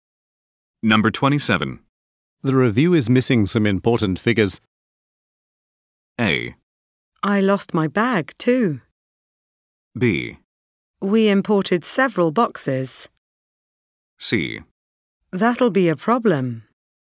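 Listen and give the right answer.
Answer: C: That'll be a problem.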